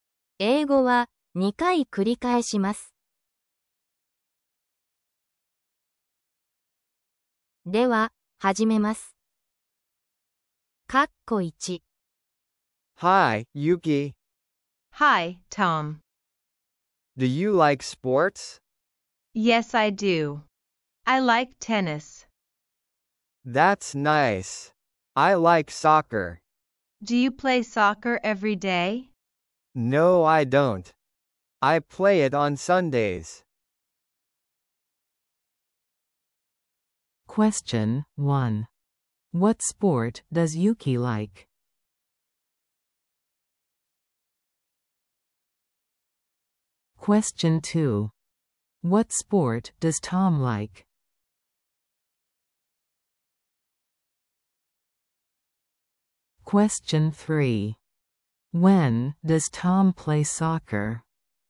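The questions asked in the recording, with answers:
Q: What sport does Yuki like?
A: Tennis

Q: What sport does Tom like?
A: Soccer

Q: When does Tom play soccer?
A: On Sundays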